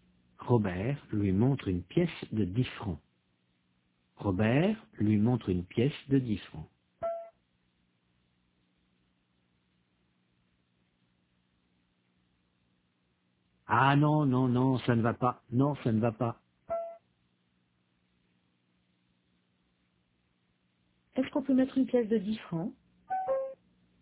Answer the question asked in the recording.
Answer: Non, ça ne va pas.